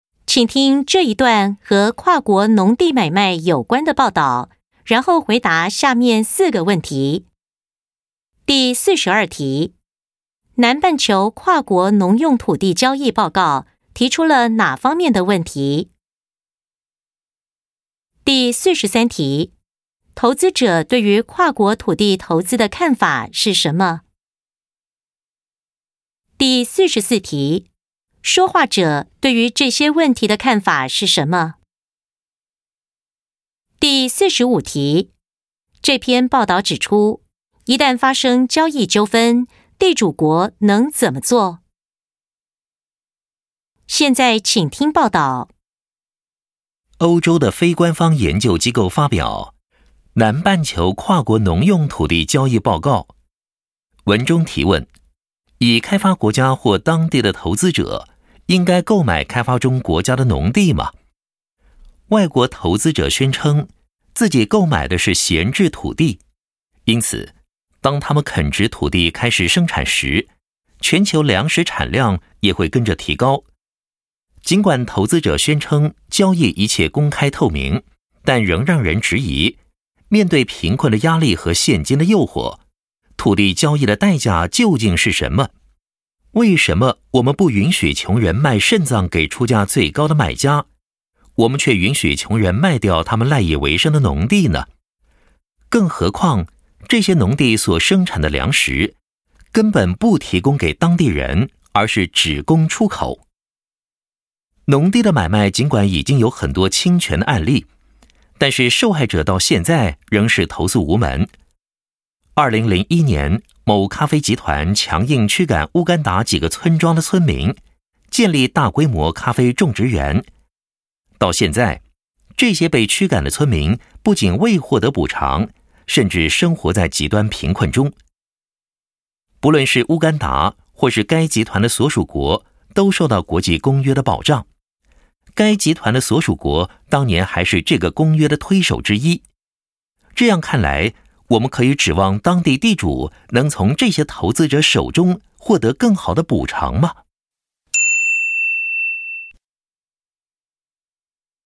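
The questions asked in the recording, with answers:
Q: 南半球跨国农用土地交易报告提出了哪方面的问题?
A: 已开发国家或当地投资者是否应该购买开发中国家的农地

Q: 投资者对于跨国土地投资的看法是什么?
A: 他们买的是闲置土地,开垦生产后能提高全球粮食产量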